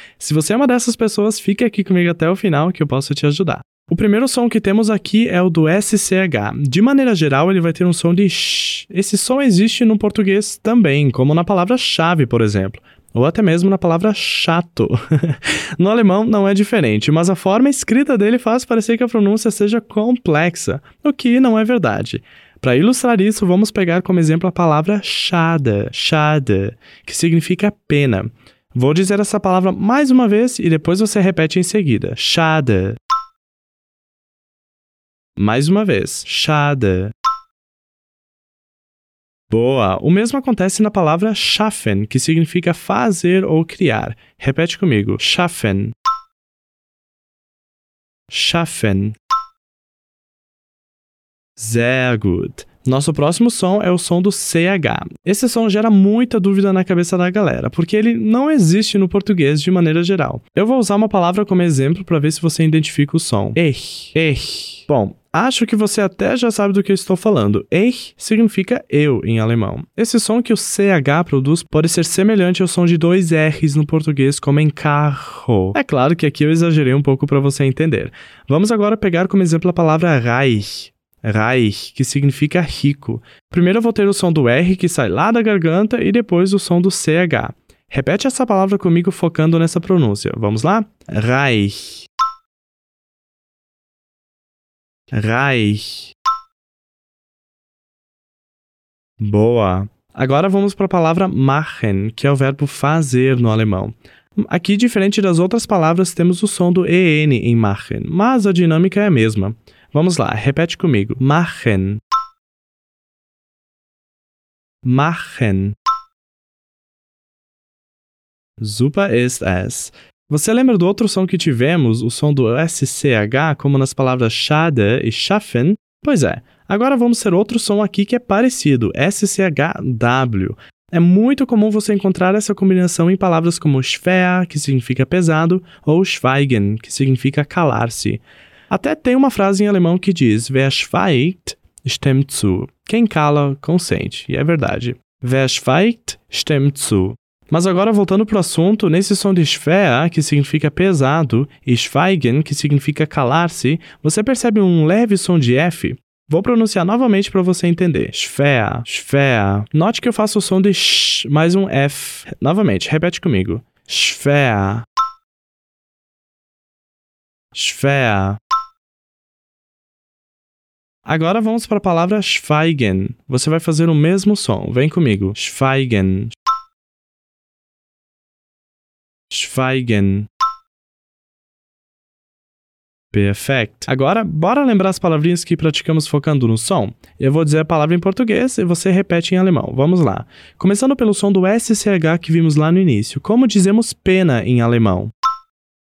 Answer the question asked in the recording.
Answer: Isso mesmo. Schade.